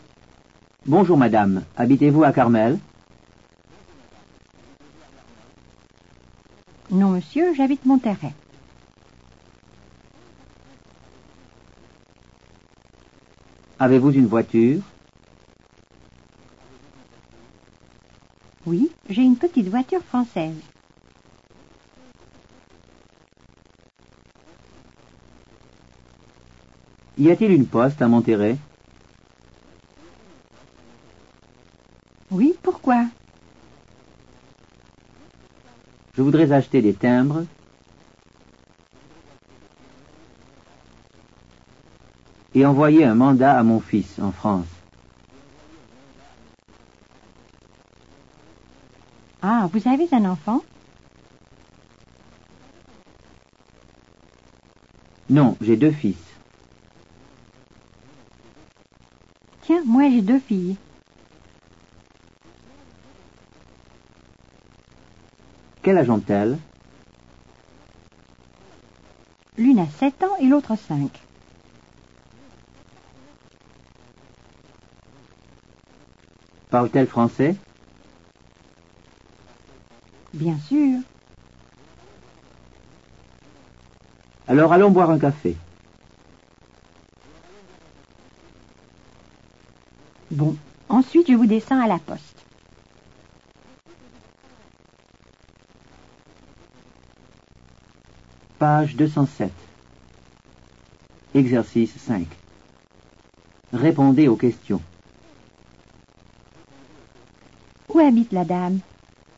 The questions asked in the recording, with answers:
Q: Où habite la dame?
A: La dame habite à Monterrey.